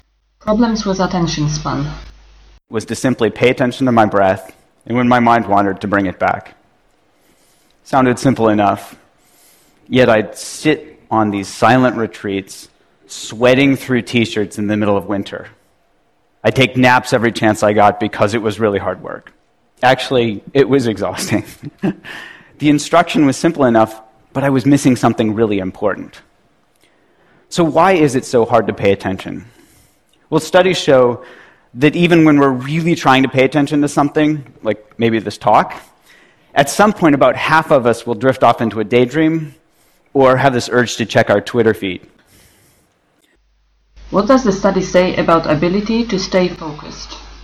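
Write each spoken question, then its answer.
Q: What does the study say about ability to stay focused?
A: Even when really trying to pay attention, about half of us will drift off into a daydream or want to check Twitter at some point.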